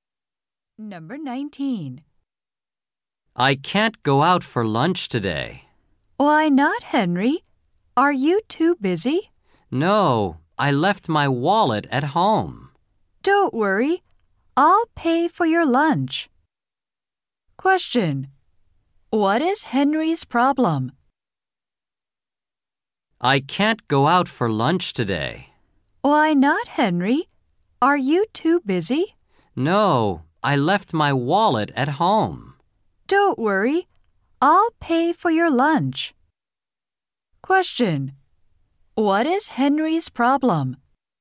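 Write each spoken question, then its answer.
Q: What is Henry's problem?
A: He left his wallet at home.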